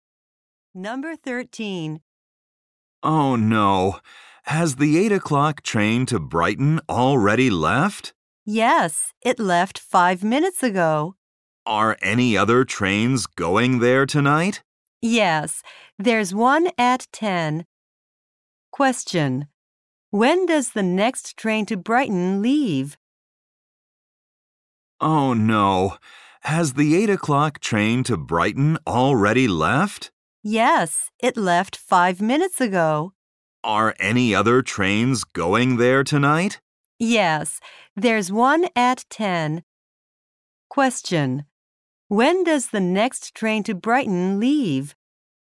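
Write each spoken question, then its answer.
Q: When does the next train to Brighton leave?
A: At 10.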